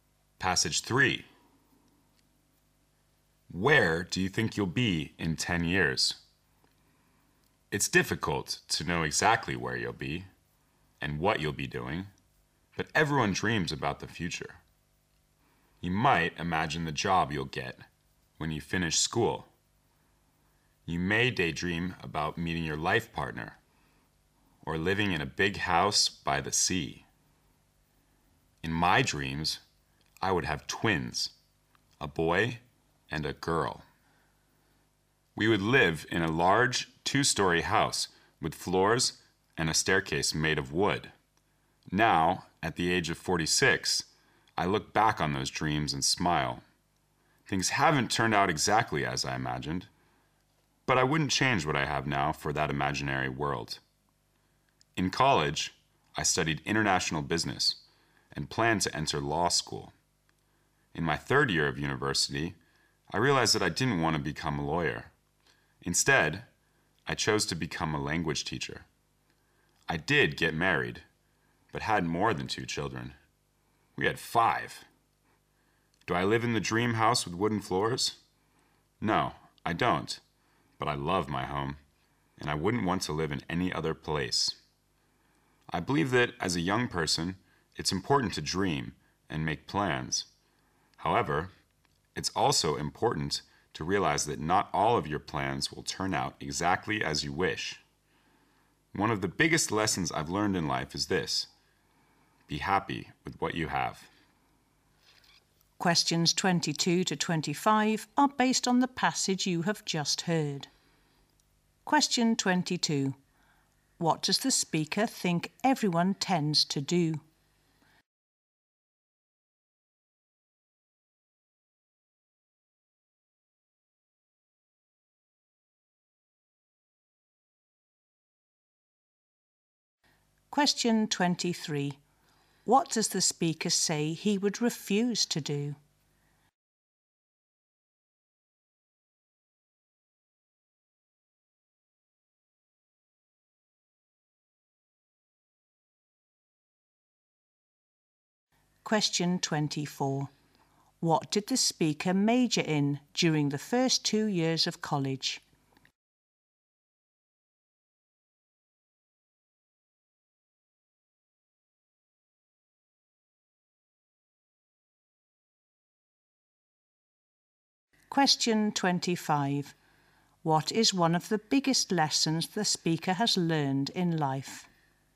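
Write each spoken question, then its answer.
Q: What does the speaker think everyone tends to do?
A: Dream about the future

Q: What does the speaker say he would refuse to do?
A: Trade what he has now for his imaginary dream world

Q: What did the speaker major in during the first 2 years of college?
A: International business

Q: What is one of the biggest lessons the speaker has learned in life?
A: Be happy with what you have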